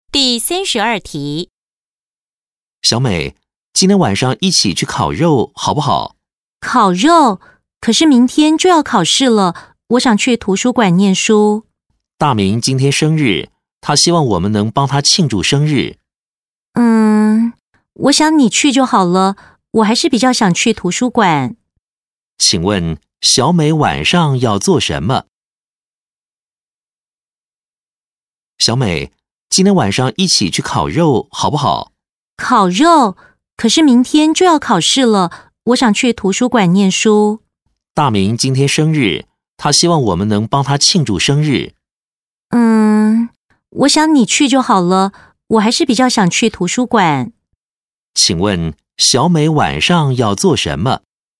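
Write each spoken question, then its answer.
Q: 请问小美晚上要做什么?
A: 去图书馆念书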